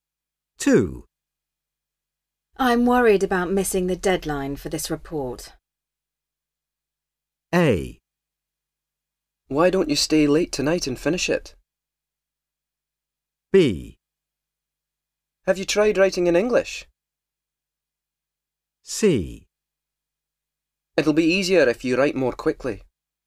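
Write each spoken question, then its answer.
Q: I'm worried about missing the deadline for this report.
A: A: Why don't you stay late tonight and finish it?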